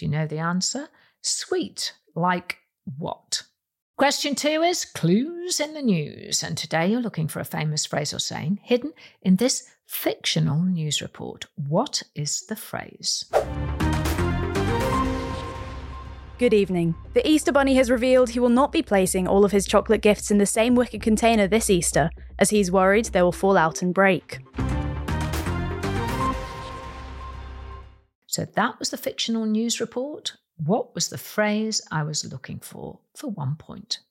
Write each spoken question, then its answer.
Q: What was the phrase I was looking for 1 point?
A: don't put all your eggs in one basket